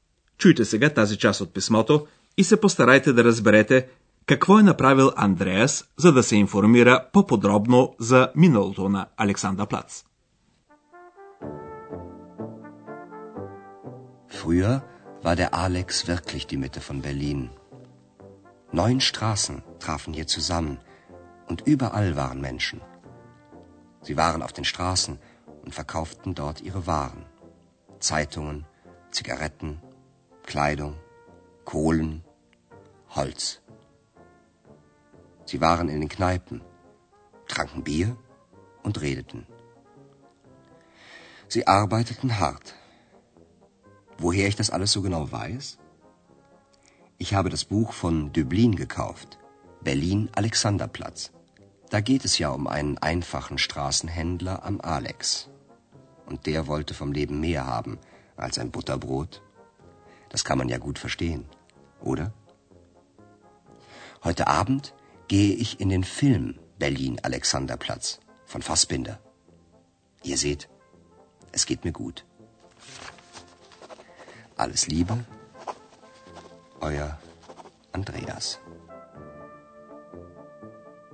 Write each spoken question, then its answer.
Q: Чуйте сега тази част от писмото и се постарайте да разберете какво е направил Андреас, за да се информира по-подробно за миналото на Александър Плац.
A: За да научи повече неща за миналото на Александър Плац, Андрея си е купил известната книга Берлин Александър Плац от Алфред Дюблин – Освен това, Андреас е решил да види и филма, заснет по материали на книгата.